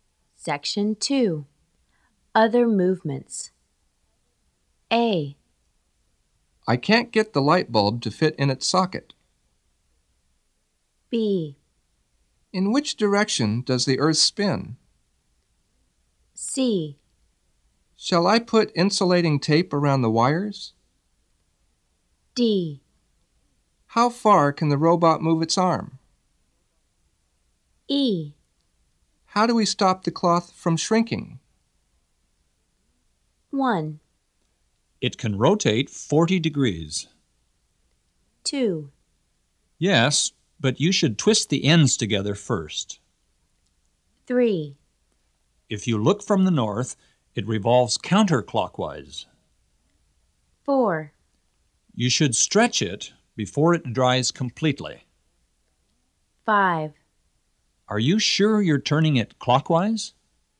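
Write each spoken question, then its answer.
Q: It can rotate 40 degrees.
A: D: How far can the robot move its arm?

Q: Yes, but you should twist the ends together first.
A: C: Shall I put insulating tape around the wires?

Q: If you look from the north, it revolves counterclockwise.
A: B: In which direction does the earth spin?

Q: You should stretch it before it dries completely.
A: E: How do we stop the cloth from shrinking?

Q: Are you sure you're turning it clockwise?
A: A: I can't get the light bulb to fit in its socket.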